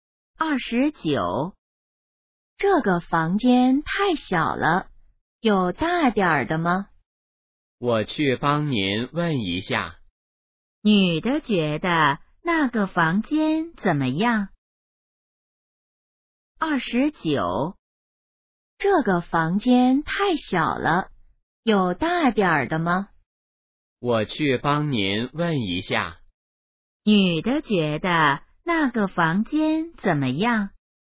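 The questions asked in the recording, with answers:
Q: 女的觉得那个房间怎么样?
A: 太小了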